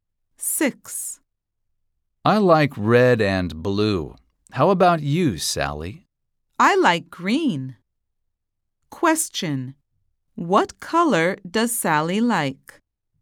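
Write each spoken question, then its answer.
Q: What color does Sally like?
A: green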